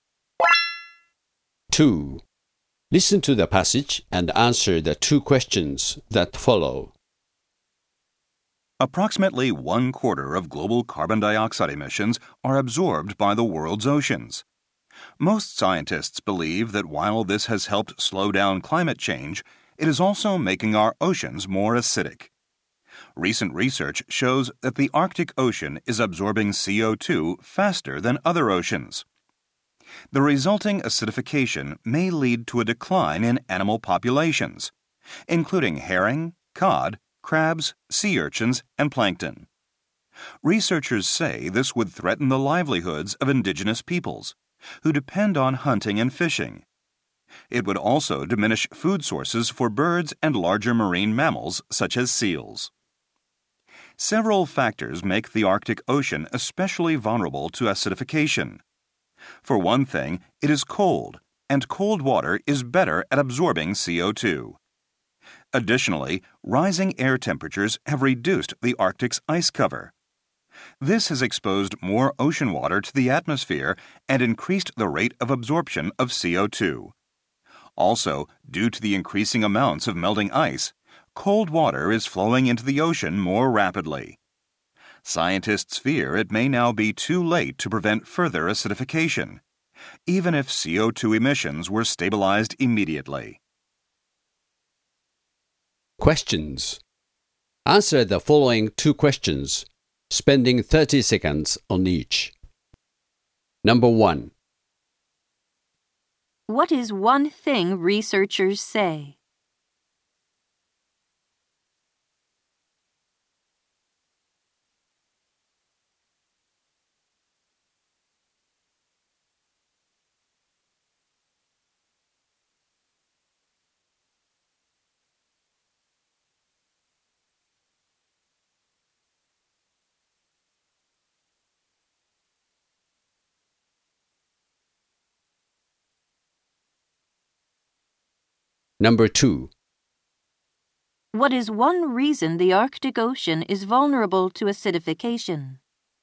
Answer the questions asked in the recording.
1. Researchers say that the rising acid content of seawater could threaten the livelihoods of indigenous peoples who rely on hunting and fishing to fill their basic needs.
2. Cold water absorbs CO2 quicker than the warmer water of other oceans, making the Arctic Ocean more vulnerable to acidification.